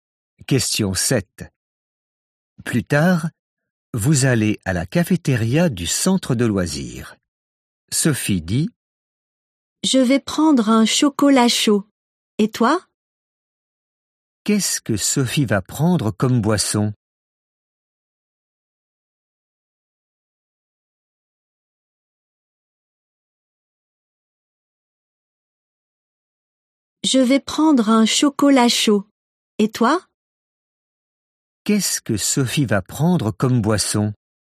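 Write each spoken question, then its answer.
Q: Qu'est-ce que Sophie va prendre comme boisson ?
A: Un chocolat chaud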